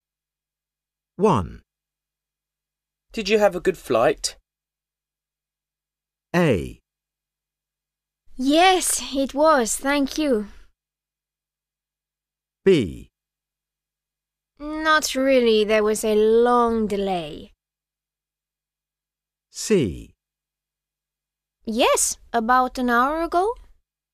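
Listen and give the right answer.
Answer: B: Not really, there was a long delay.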